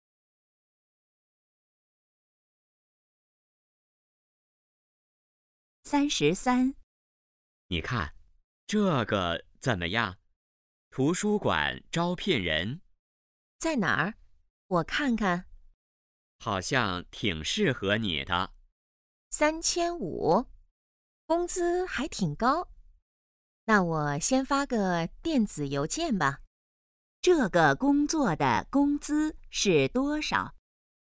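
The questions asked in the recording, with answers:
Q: 这个工作的工资是多少?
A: 3500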